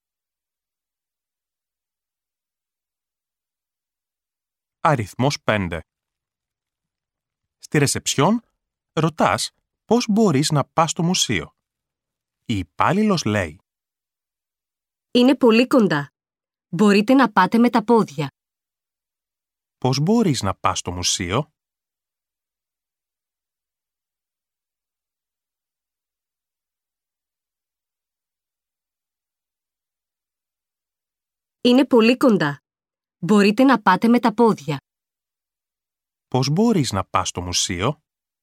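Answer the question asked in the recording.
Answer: Με τα πόδια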